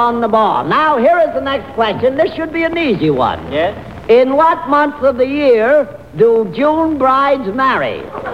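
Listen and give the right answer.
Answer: June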